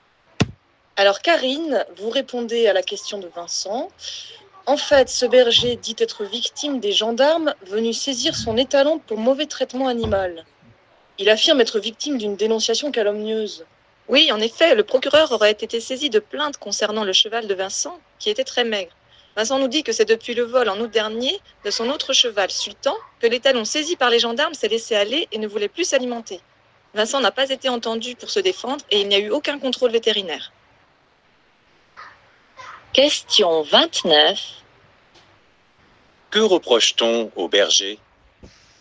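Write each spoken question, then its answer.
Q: Que reproche-t-on au berger?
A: De maltraiter son cheval (l'étalon était très maigre)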